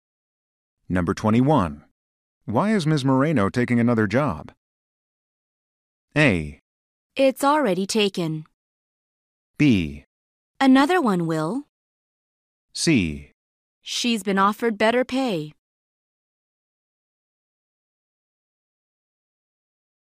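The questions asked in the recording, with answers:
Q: Why is Ms. Moreno taking another job?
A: C: She's been offered better pay.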